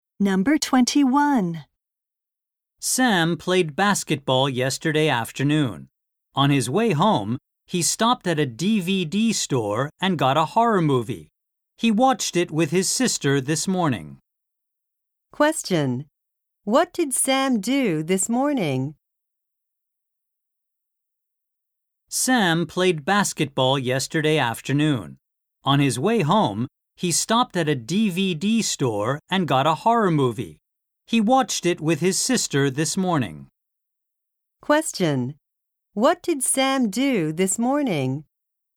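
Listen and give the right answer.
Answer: He watched a horror movie with his sister.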